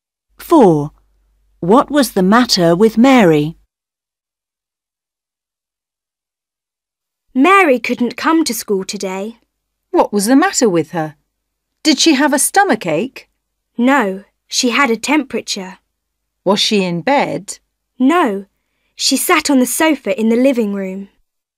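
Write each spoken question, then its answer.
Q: What was the matter with Mary?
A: she had a temperature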